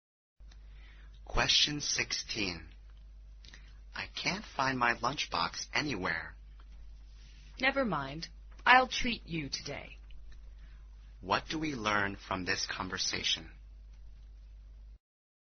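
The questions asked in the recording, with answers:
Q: What do we learn from this conversation?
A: The speaker can't find the lunchbox, so the other will pay for lunch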